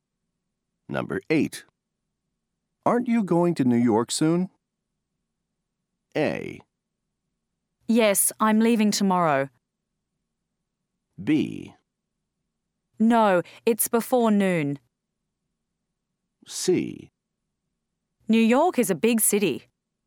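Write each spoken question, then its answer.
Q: Aren't you going to New York soon?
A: A: Yes, I'm leaving tomorrow.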